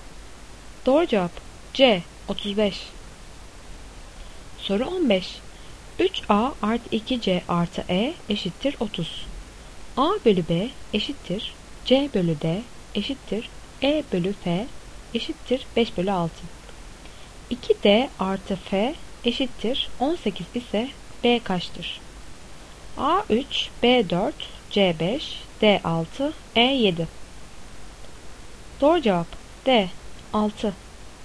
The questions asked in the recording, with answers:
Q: 2D artı F eşittir 18 ise B kaçtır?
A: Doğru cevap D 6.